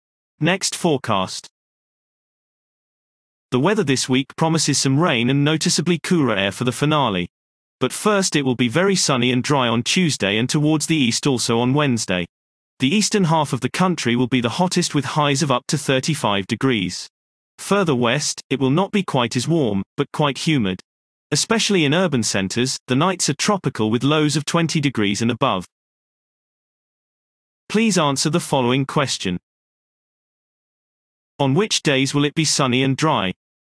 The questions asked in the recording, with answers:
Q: On which days will it be sunny and dry?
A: Sunny and dry weather is forecast for Tuesday and Wednesday.